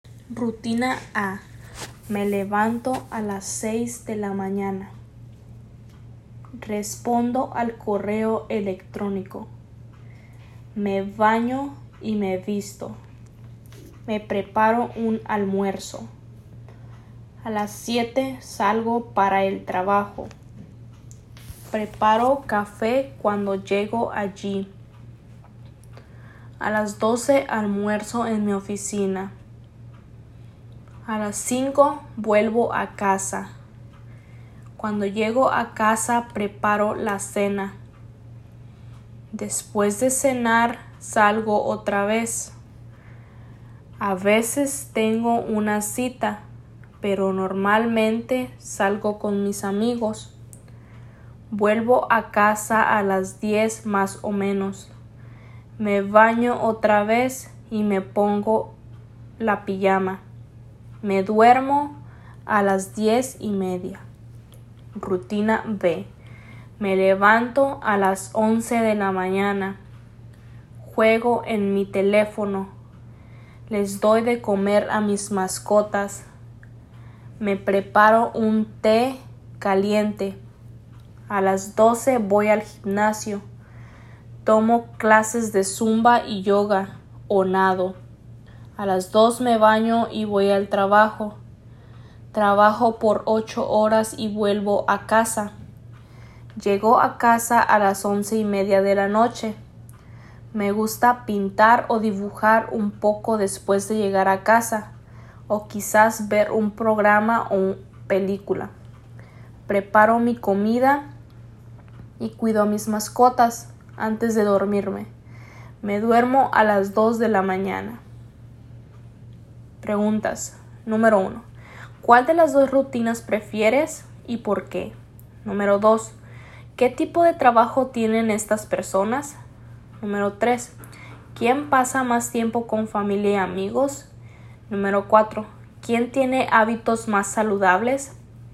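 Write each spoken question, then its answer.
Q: ¿Quién pasa más tiempo con familia y amigos?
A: La persona de la rutina A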